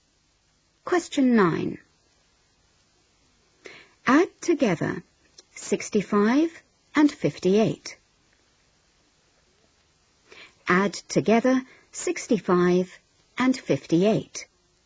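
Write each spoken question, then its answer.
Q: Add together 65 and 58.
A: 123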